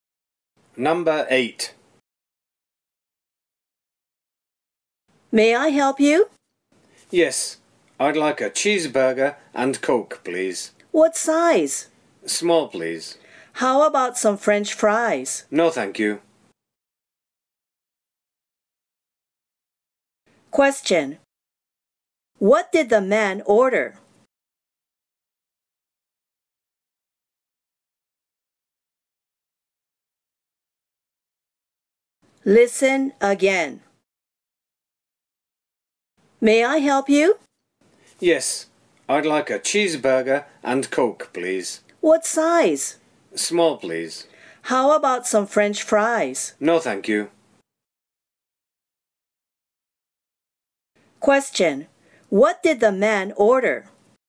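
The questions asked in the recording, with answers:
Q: What did the man order?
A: A cheeseburger and a small Coke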